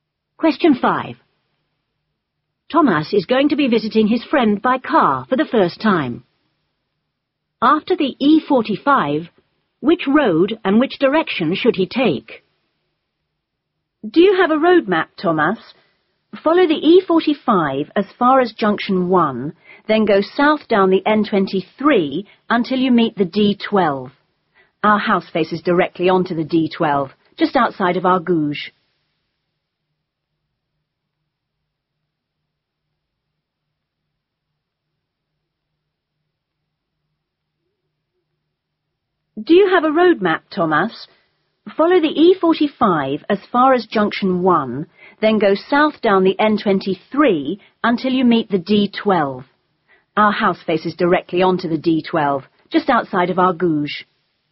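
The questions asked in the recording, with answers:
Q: After the E45, which road and which direction should he take?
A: The N23, going south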